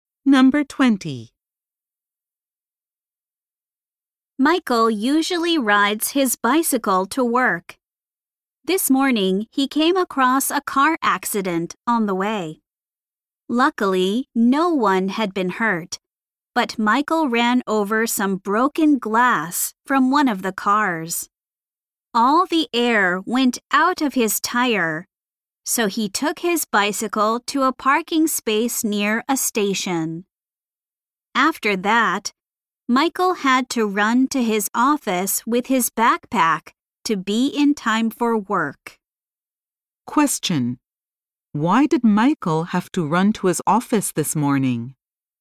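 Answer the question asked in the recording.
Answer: His bicycle got a flat tire from broken glass.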